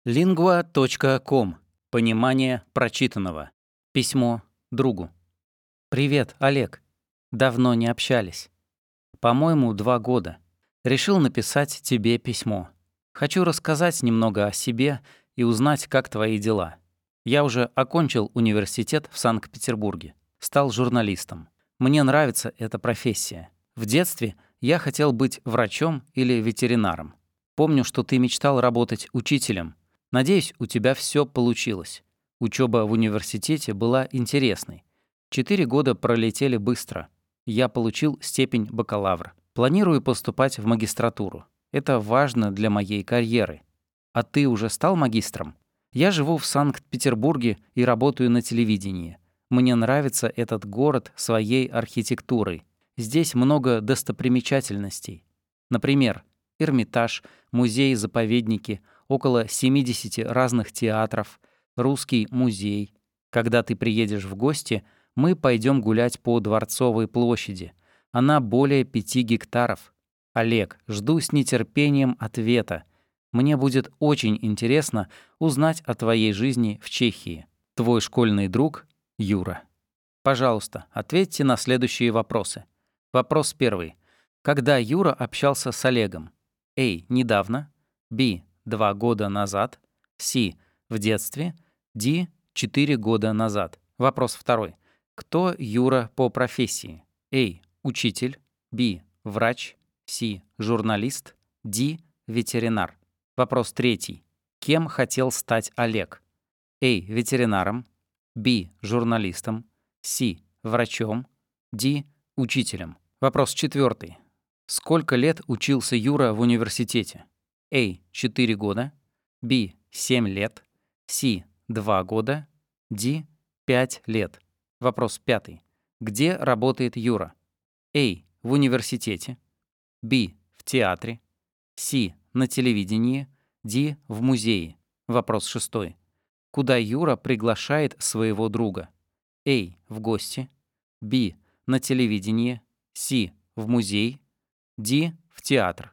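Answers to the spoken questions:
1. B: 2 года назад.
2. C: Журналист.
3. D: Учителем.
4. A: 4 года.
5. C: На телевидении.
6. A: В гости.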